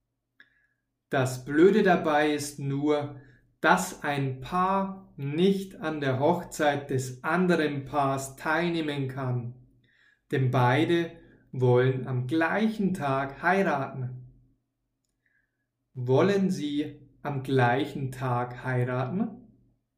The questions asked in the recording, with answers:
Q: Wollen Sie am gleichen Tag heiraten?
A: Ja, das wollen Sie. Sie wollen am gleichen Tag heiraten.